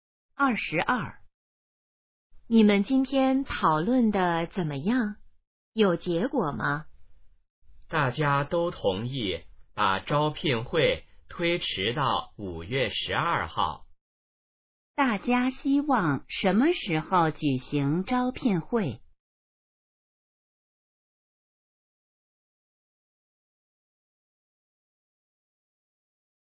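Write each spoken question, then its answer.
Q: 大家希望什么时候举行招聘会?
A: 5月12号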